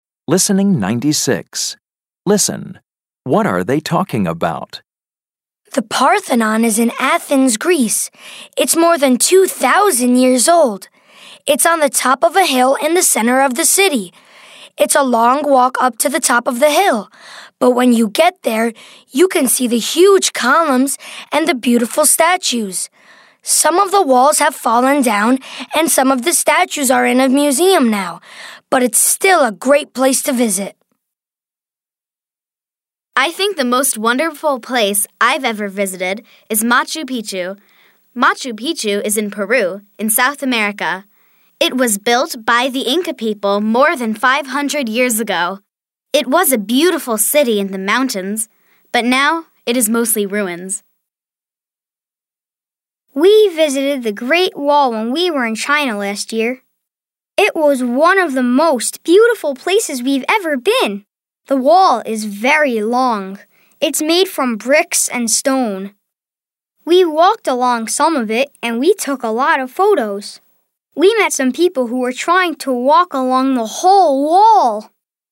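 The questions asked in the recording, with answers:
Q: What are they talking about?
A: Famous old places they have visited (the Parthenon, Machu Picchu, the Great Wall)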